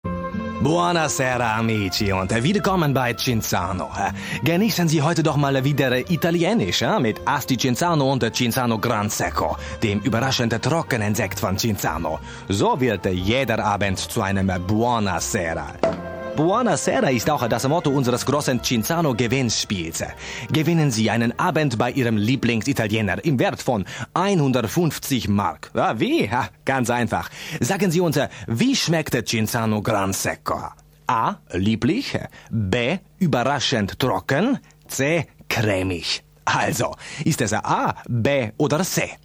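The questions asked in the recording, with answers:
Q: Sagen Sie uns, wie schmeckt Cinzano Gran Secco?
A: B: Überraschend trocken.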